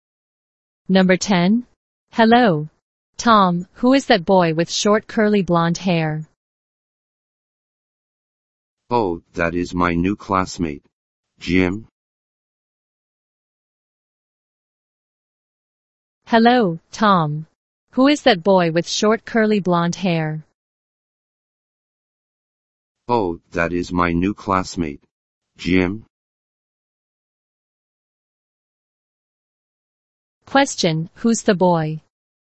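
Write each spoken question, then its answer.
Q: Question, who's the boy?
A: Jim, Tom's new classmate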